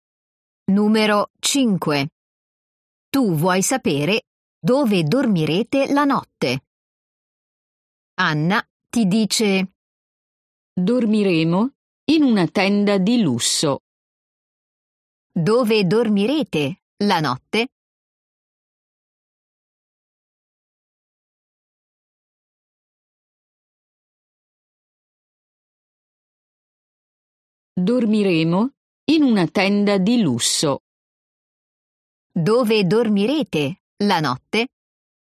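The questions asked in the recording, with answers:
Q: Dove dormirete la notte?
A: In una tenda di lusso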